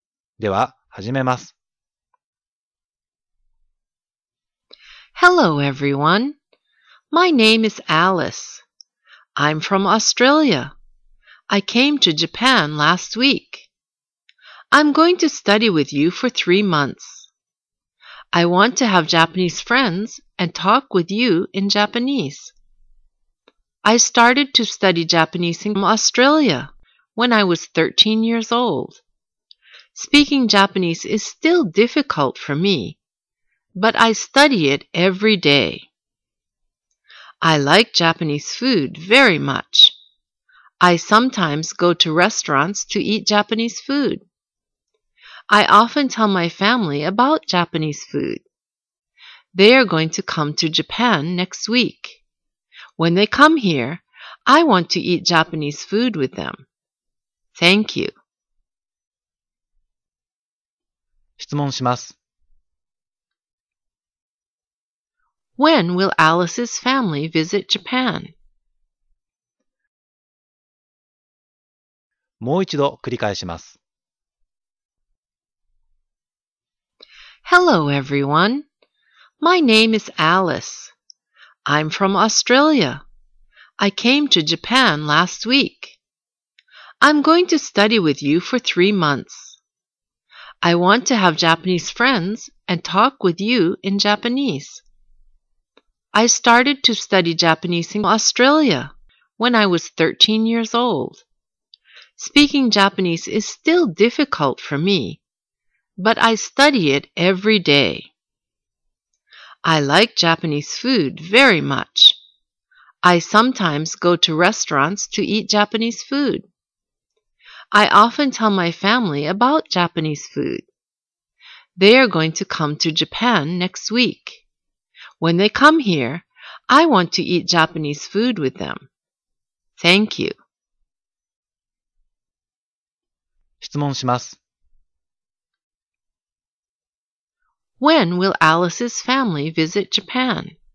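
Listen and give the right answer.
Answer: Next week.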